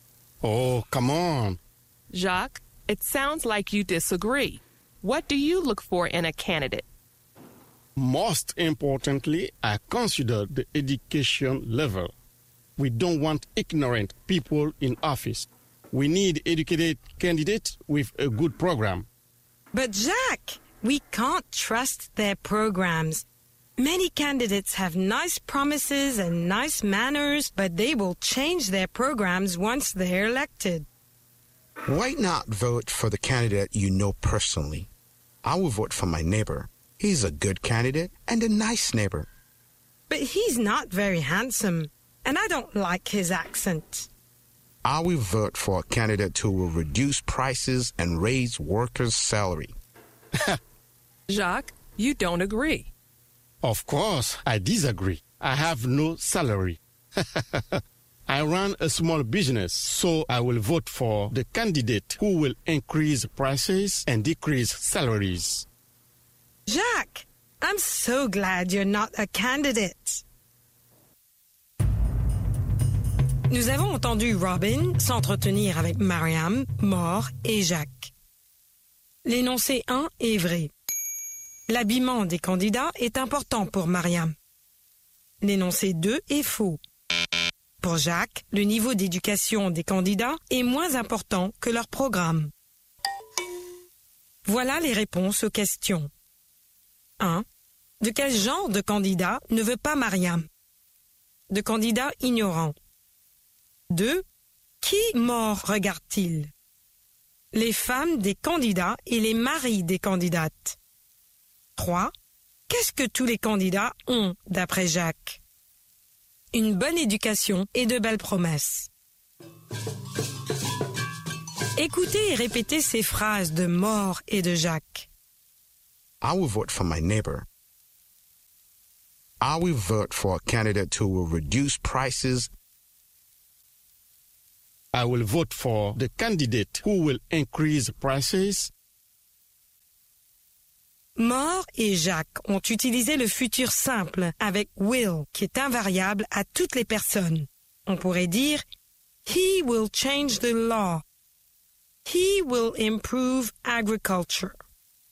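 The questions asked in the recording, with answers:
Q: L'habillement des candidats est important pour Mariam.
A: Vrai

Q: Pour Jacques, le niveau d'éducation des candidats est moins important que leur programme.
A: Faux

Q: Qui mort regarde-t-il?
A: Les épouses ou les maris des candidats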